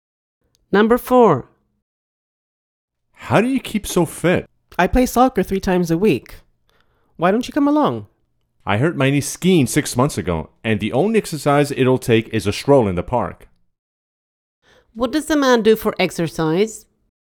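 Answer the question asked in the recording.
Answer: Walks in the park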